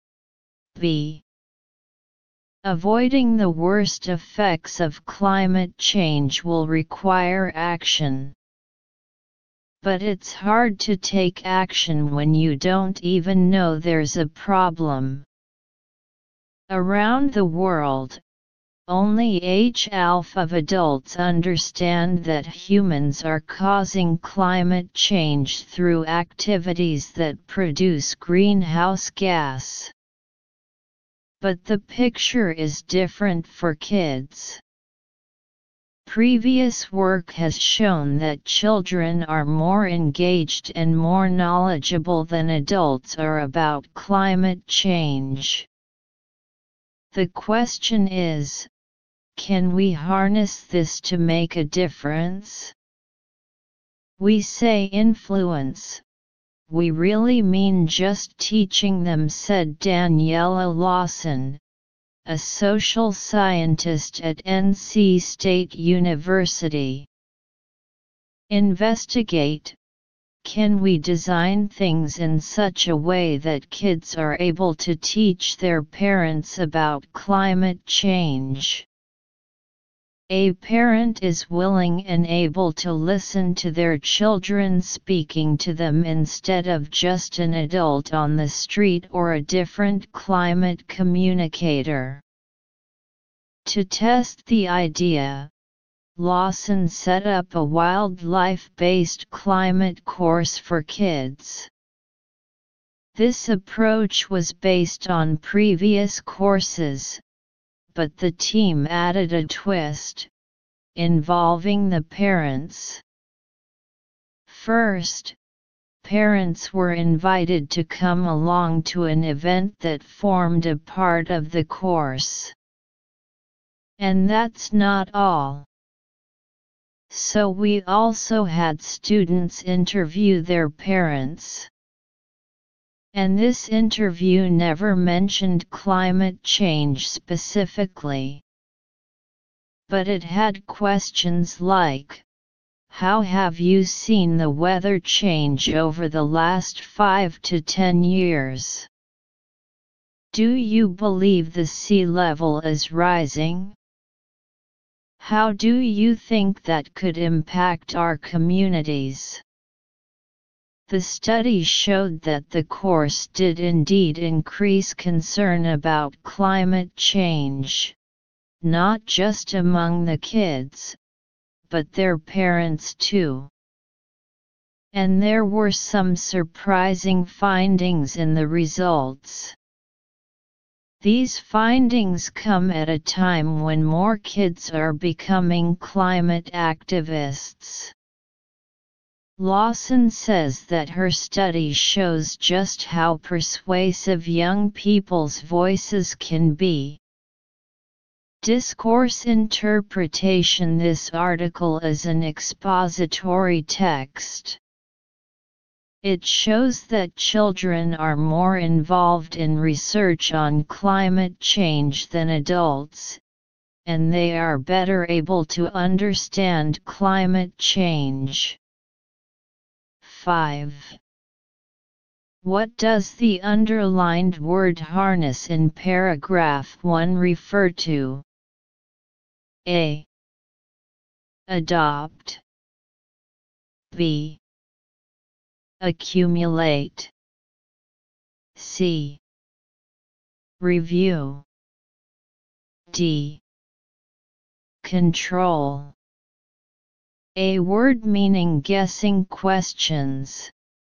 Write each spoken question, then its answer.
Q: What does the underlined word harness in paragraph 1 refer to?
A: It can be deduced that the underlined word means adoption.